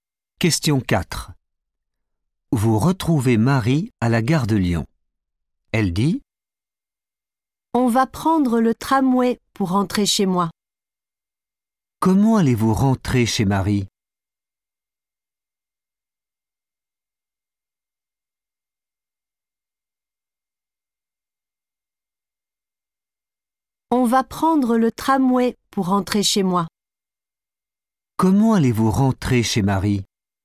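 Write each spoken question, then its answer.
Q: Comment allez-vous rentrer chez Marie ?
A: en tramway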